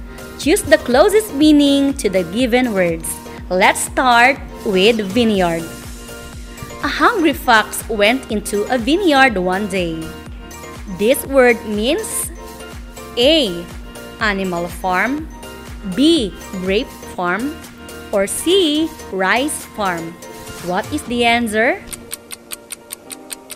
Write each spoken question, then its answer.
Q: What is the answer?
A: The word vineyard means letter B, ma'am.